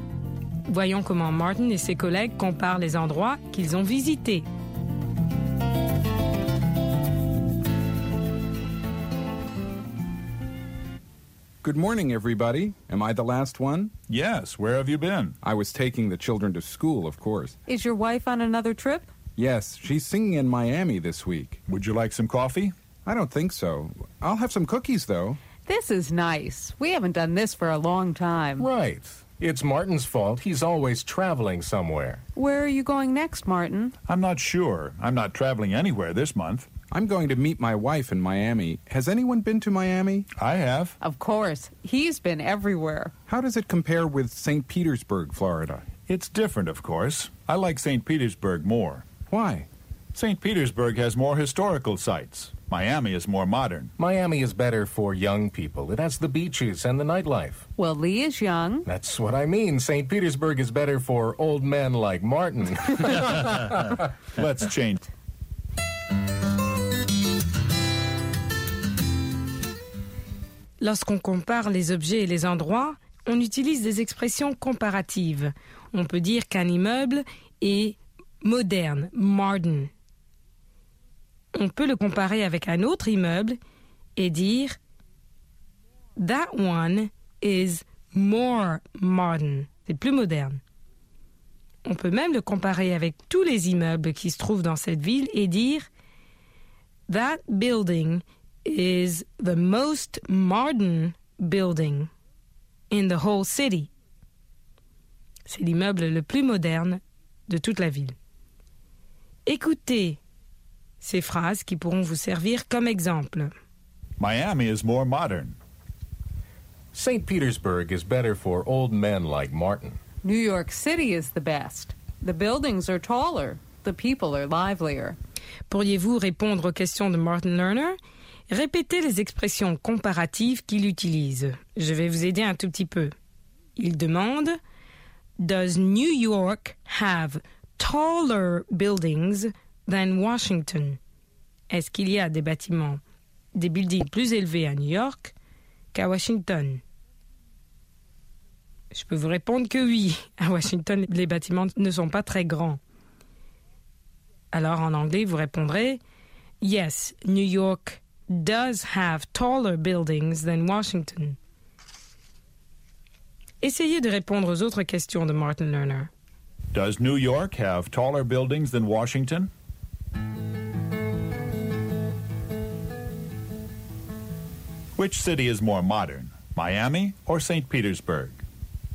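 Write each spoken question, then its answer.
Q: Which city is more modern, Miami or St.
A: Miami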